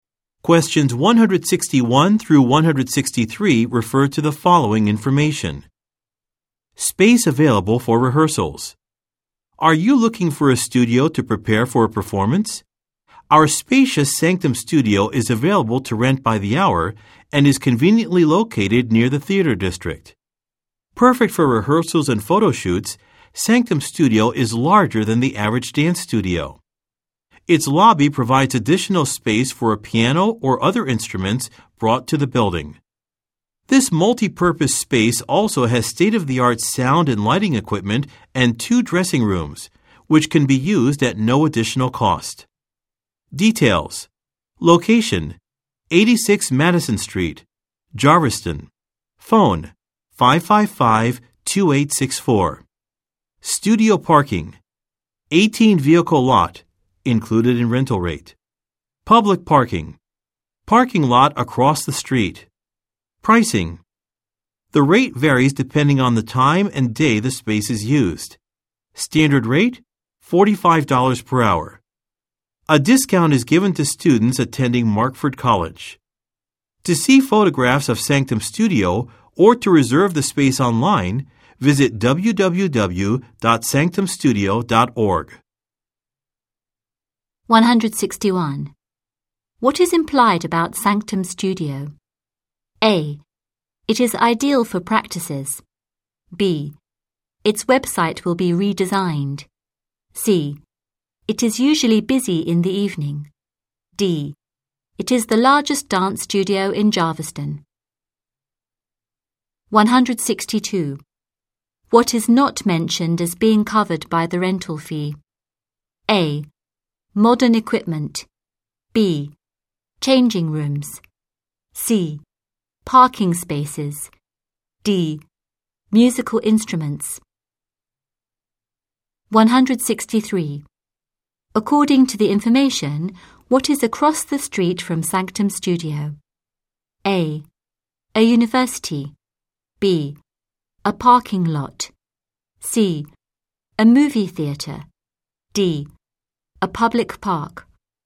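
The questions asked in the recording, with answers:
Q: What is implied about Sanctum Studio?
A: A: It is ideal for practices.

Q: What is not mentioned as being covered by the rental fee?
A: D: Musical instruments.

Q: According to the information, what is across the street from Sanctum Studio?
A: B: A parking lot.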